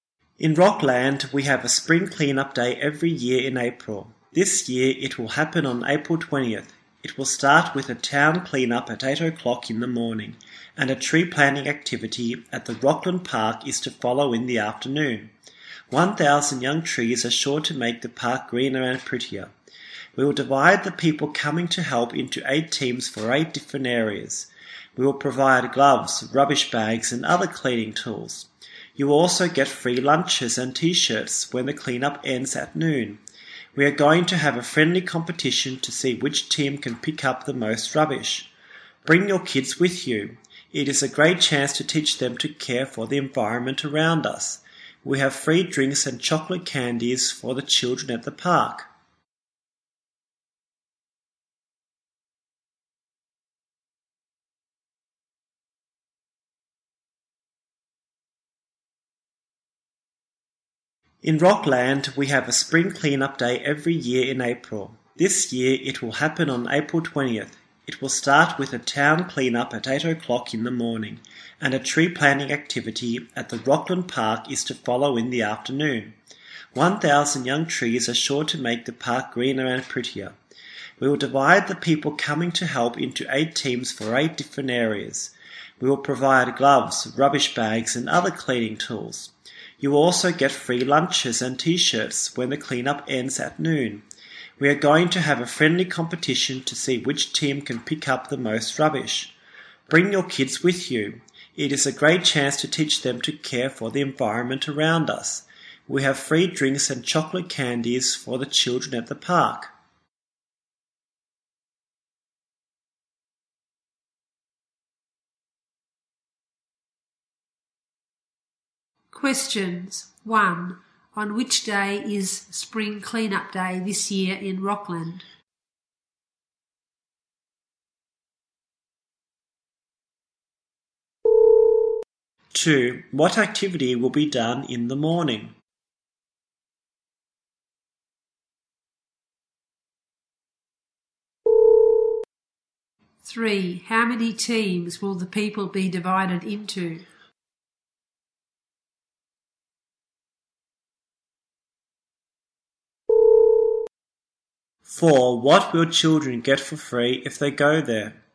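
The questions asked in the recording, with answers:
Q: On which day is Spring Cleanup Day this year in Rockland?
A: April 20th

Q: What activity will be done in the morning?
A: A town clean-up

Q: What will children get for free if they go there?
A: Drinks and chocolate candies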